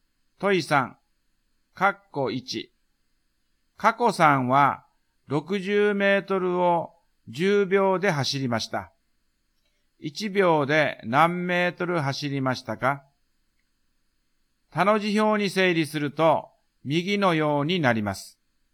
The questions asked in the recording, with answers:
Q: 1秒で何メートル走りましたか?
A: 1秒間に6メートルですね。